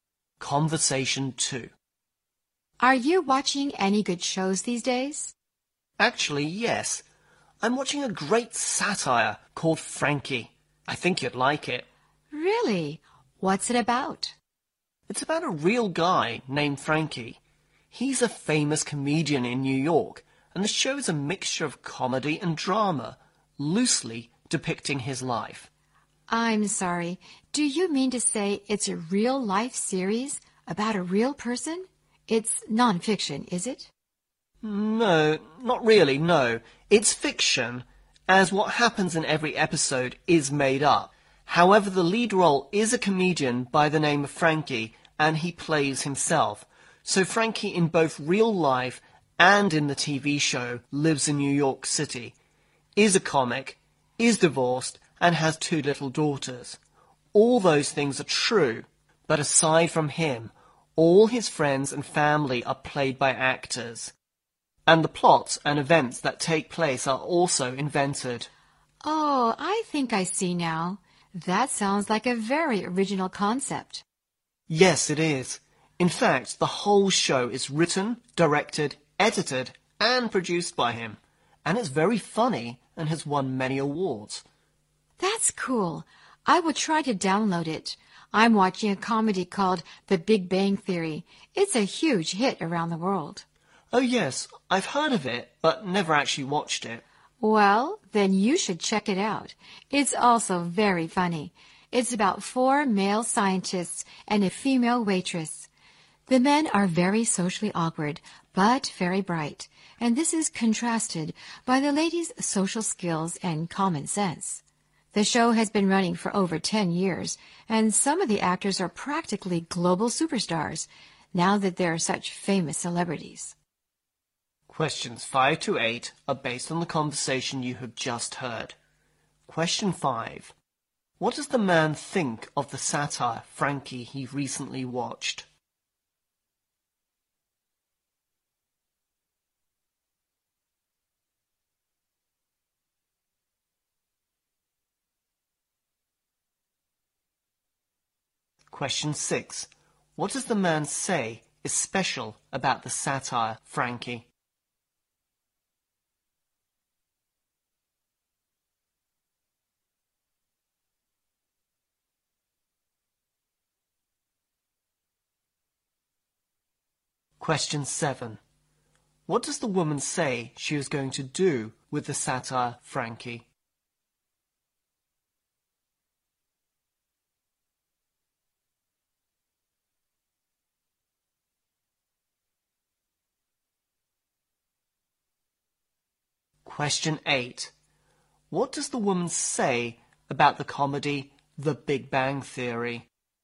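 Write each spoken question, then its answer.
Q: What does the man think of the satire, Frankie, he recently watched?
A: It is great, very funny and original

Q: What does the man say is special about the satire, Frankie?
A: The comedian plays himself and writes, directs, edits and produces the show

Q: What does the woman say she is going to do with the satire, Frankie?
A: Download it

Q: What does the woman say about the comedy The Big Bang Theory?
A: She has heard of it but never watched it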